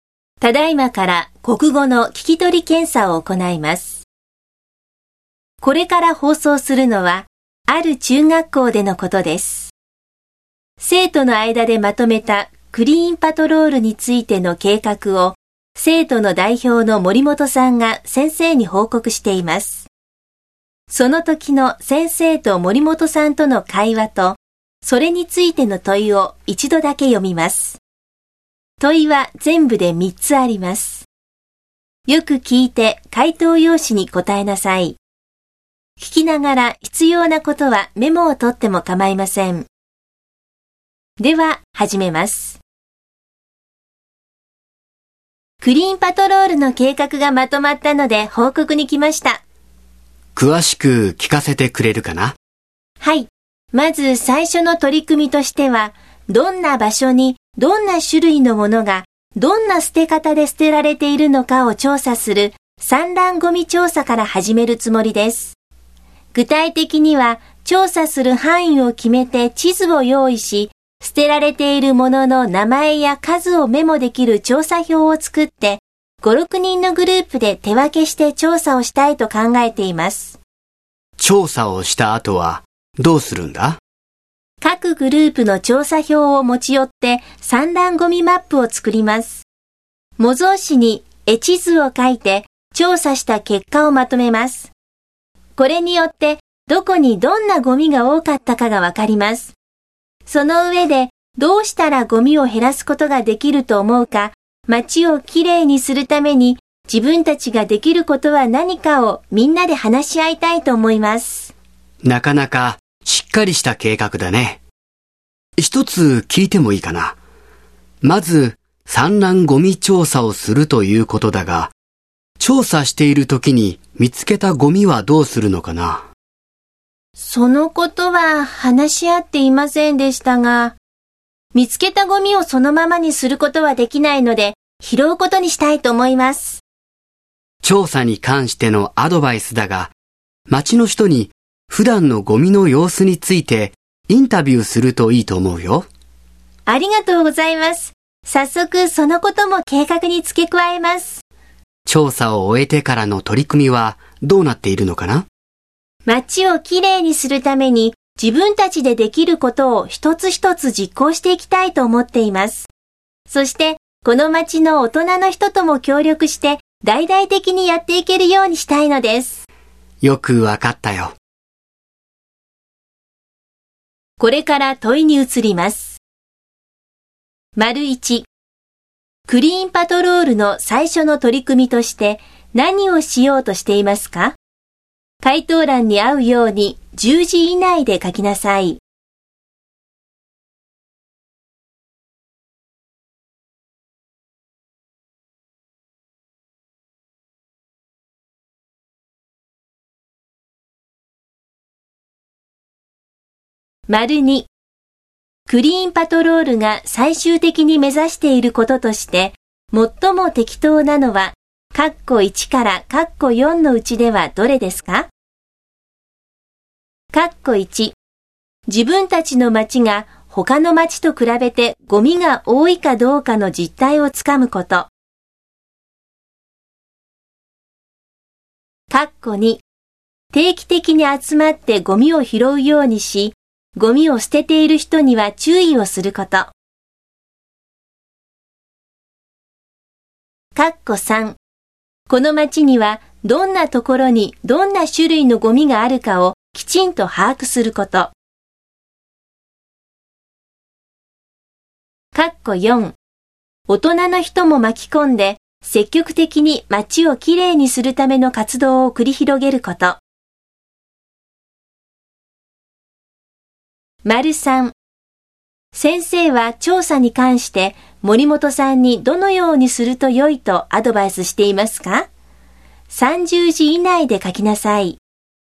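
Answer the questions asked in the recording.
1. 散乱ゴミ調査
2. 4: 大人の人も巻き込んで積極的に町をきれいにするための活動を繰り広げること。
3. 町の人に普段のゴミの様子についてインタビューするとよい。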